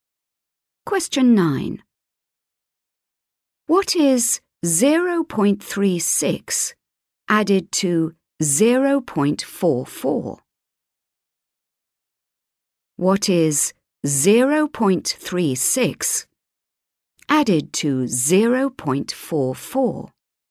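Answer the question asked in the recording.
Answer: 0.8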